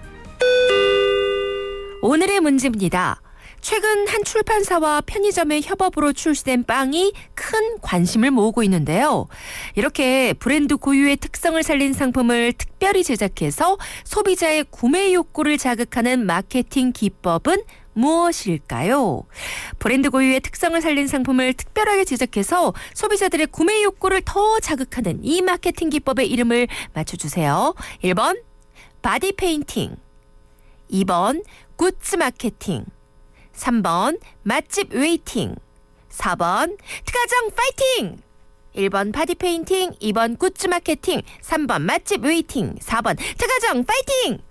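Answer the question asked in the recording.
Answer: 2: 굿즈 마케팅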